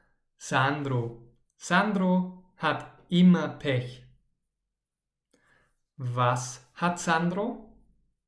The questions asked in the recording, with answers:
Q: Was hat Sandro?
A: Pech. Er hat immer Pech.